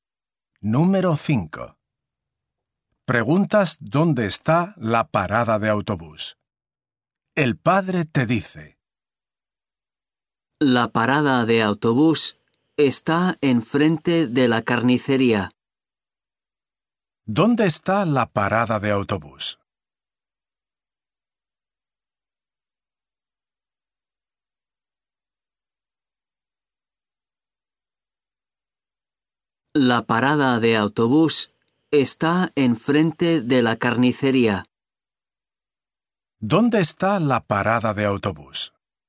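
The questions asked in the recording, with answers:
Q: ¿Dónde está la parada de autobús?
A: enfrente de la carnicería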